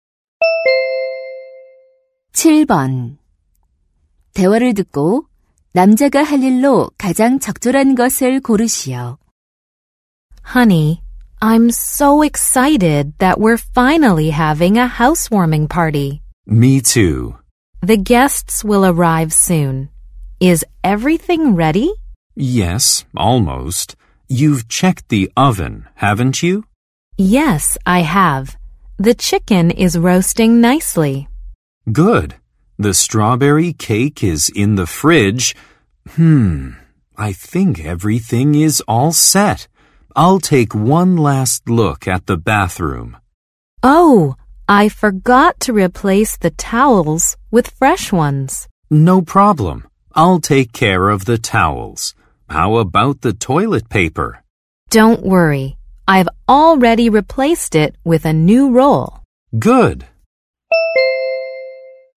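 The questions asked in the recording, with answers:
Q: 대화를 듣고 남자가 할 일로 가장 적절한 것을 고르시오.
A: 욕실 수건 교체하기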